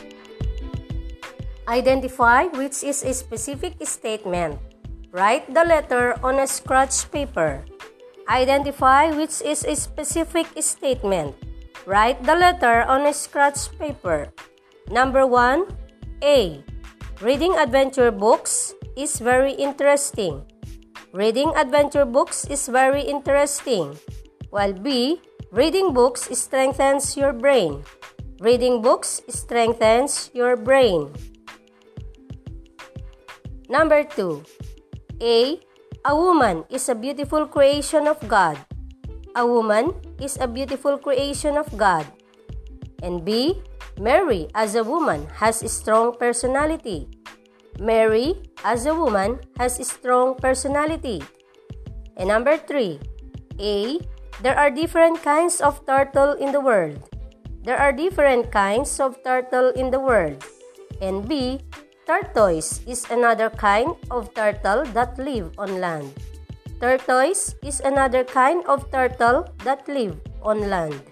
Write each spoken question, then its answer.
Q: Number one, A. Reading adventure books is very interesting.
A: number one is A

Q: Number two, A, a woman is a beautiful creation of God.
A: number two is B

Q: And number three, A, there are different kinds of turtle in the world.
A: number three is B